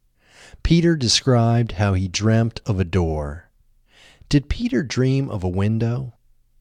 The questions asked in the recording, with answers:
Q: Did Peter dream of a window?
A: No, Peter didn't dream of a window.